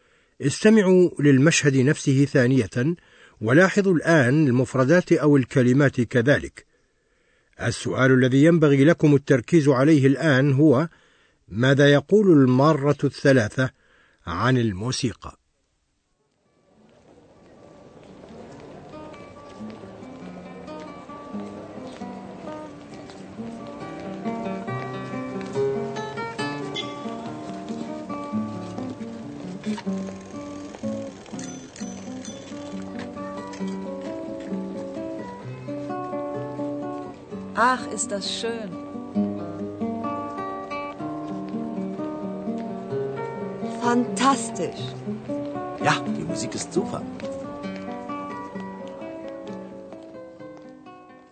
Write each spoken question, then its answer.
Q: ماذا يقول المارة الثلاثة عن الموسيقى؟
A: الثلاثة معجبون بالموسيقى.